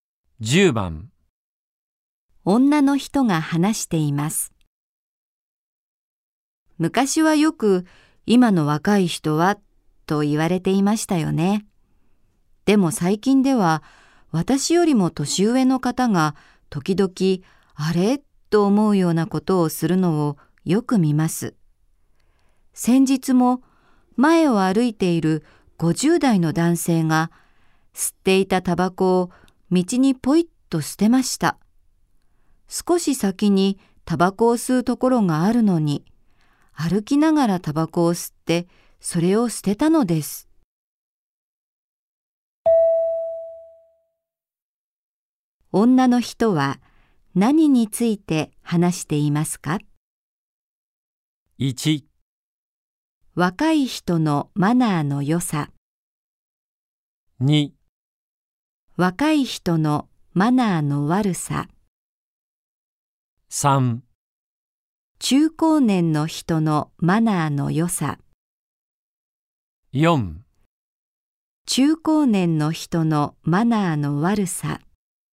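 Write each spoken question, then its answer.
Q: 女の人は何について話していますか?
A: 4: 中高年の人のマナーの悪さ。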